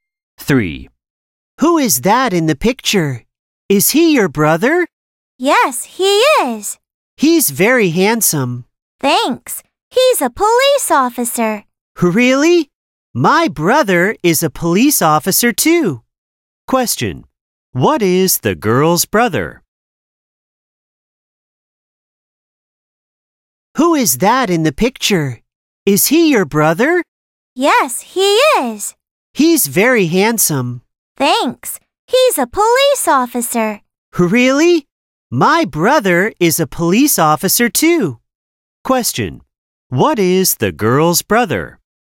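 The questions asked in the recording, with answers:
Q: What is the girl's brother?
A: A police officer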